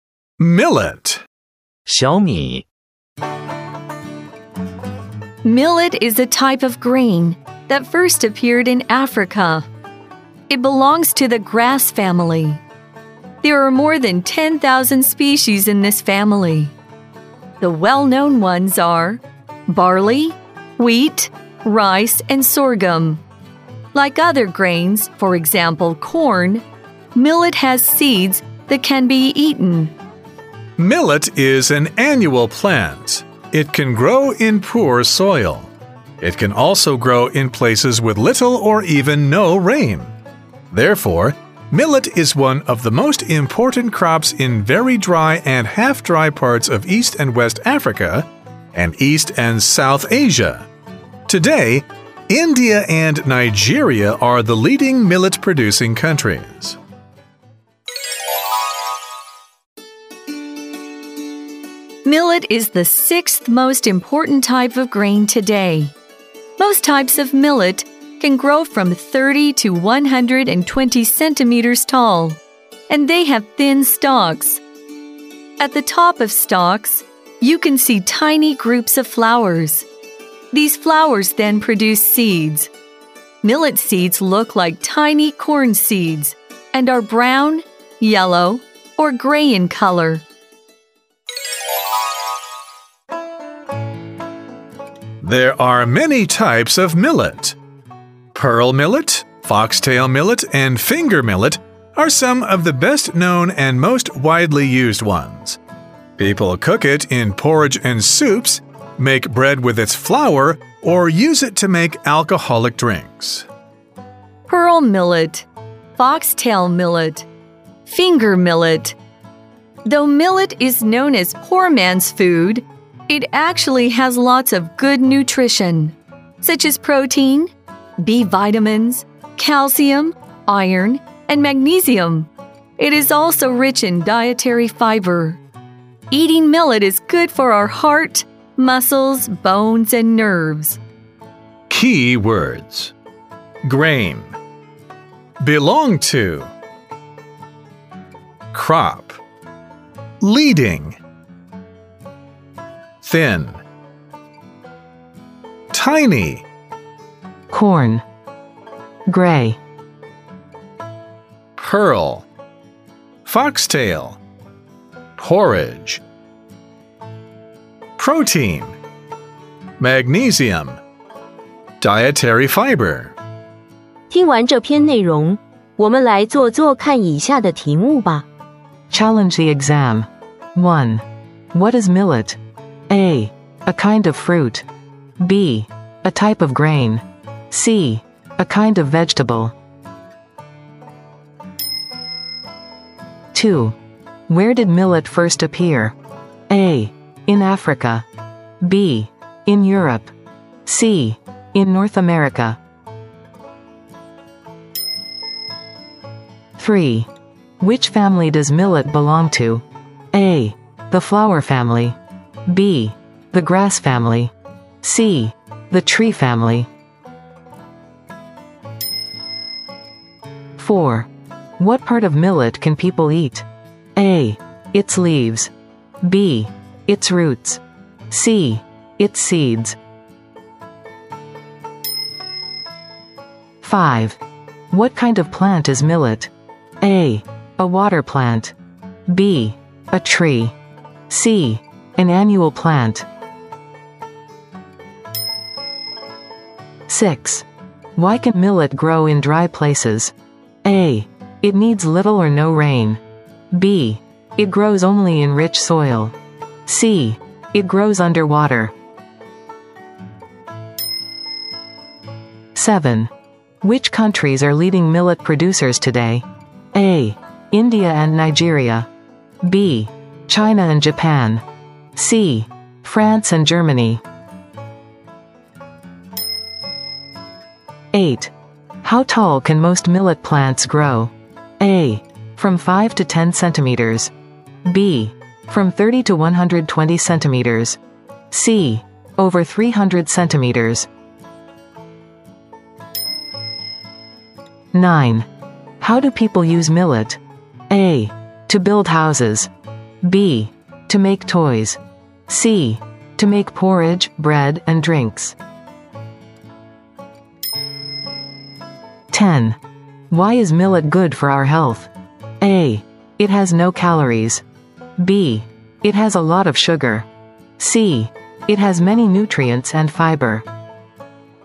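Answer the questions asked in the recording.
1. B: A type of grain.
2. A: In Africa.
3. B: The grass family.
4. C: Its seeds.
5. C: An annual plant.
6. A: It needs little or no rain.
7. A: India and Nigeria.
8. B: from 30 to 120 centimeters.
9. C: to make porridge, bread, and drinks.
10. C: It has many nutrients and fiber.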